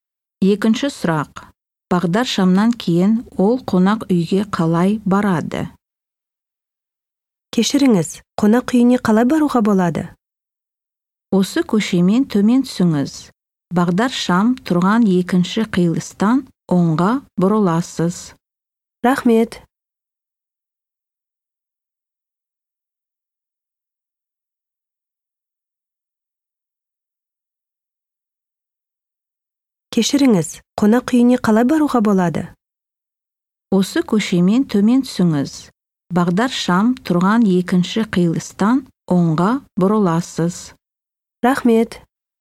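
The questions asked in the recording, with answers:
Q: Бағдар шамнан кейін ол қонақ үйге қалай барады?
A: Оңға бұрылады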